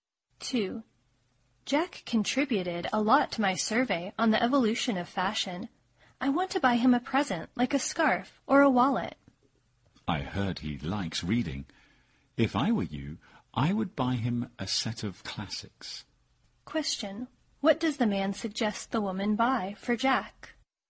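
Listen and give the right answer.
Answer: A set of classics.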